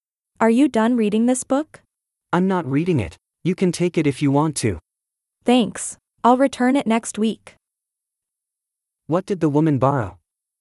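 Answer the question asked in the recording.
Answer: A book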